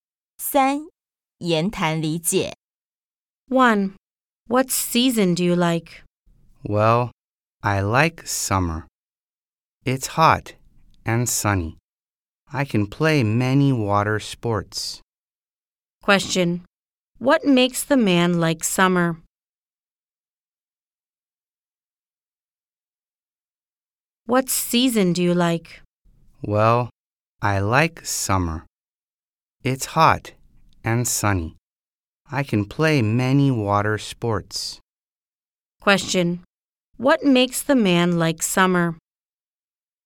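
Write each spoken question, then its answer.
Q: What makes the man like summer?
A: It's hot and sunny and he can play many water sports.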